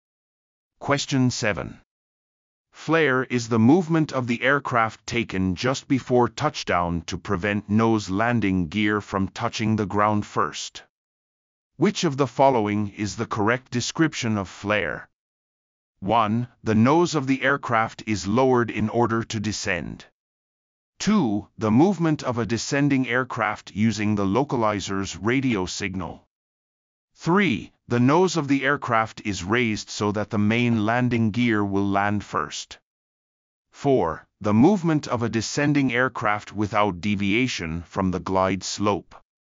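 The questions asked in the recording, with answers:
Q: Which of the following is the correct description of flare?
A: 3: The nose of the aircraft is raised so that the main landing gear will land first.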